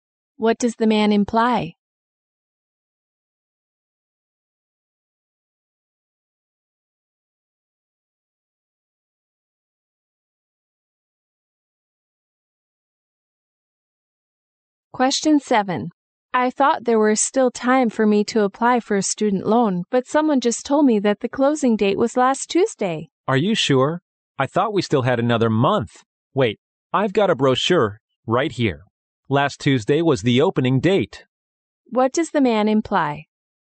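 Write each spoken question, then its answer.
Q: What does the man imply?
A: The woman can still apply for the loan, since last Tuesday was the opening date.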